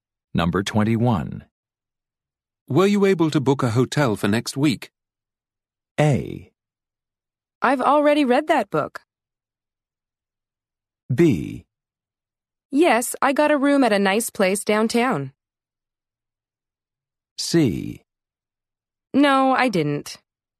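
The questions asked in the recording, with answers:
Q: Were you able to book a hotel for next week?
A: B: Yes, I got a room at a nice place downtown.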